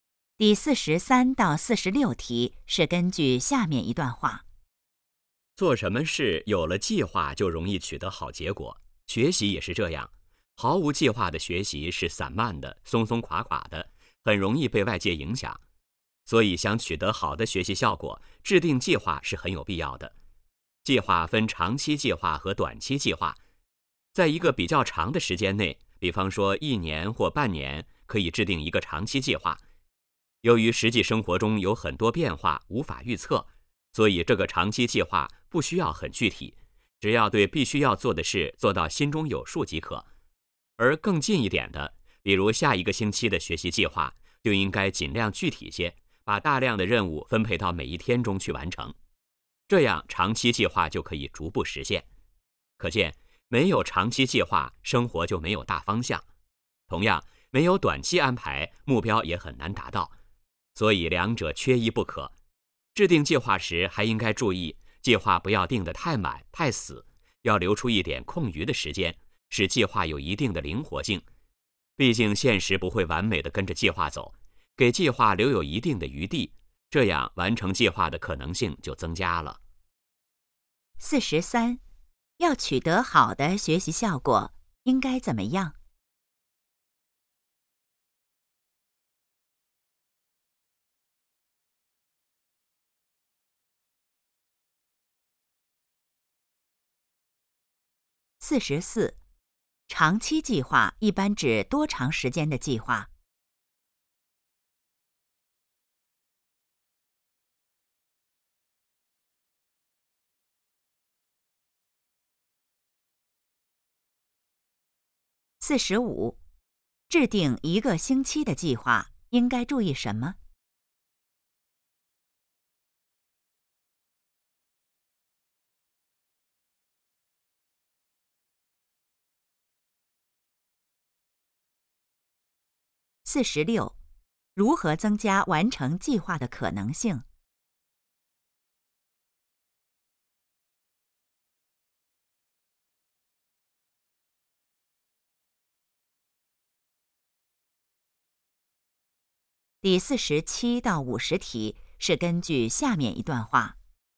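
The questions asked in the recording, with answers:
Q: 要取得好的学习效果,应该怎么样?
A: 制定计划

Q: 长期计划一般指多长时间的计划?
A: 一年或半年

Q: 制定一个星期的计划,应该注意什么?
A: 尽量具体

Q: 如何增加完成计划的可能性?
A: 留出一点空余时间,使计划灵活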